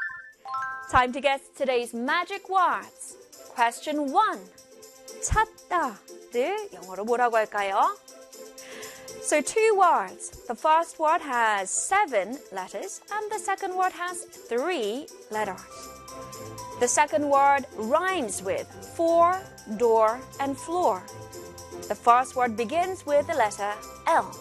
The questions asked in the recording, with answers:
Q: 찾다를 영어로 뭐라고 할까요?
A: 찾다. 영어로는 looking for. Looking for.